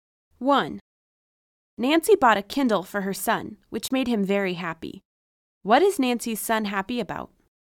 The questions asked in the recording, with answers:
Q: What is Nancy's son happy about?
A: He's happy about his mother's buying him a Kindle.